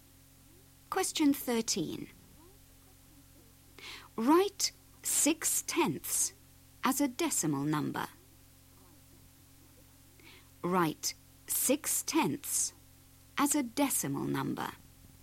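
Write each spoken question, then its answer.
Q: Write 6/10 as a decimal number.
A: 0.6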